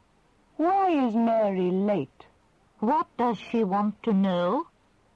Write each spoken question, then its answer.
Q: What does she want to know?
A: She wants to know why Mary is late.